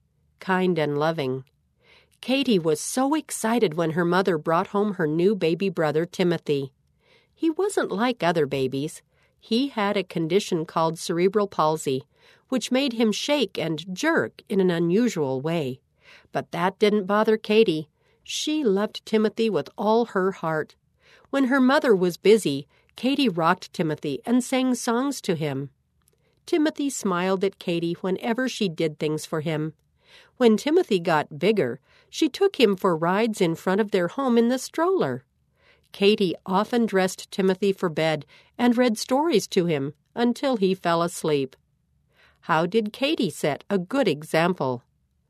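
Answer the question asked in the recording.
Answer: She loved and cared for her brother Timothy, rocking him, singing, and reading to him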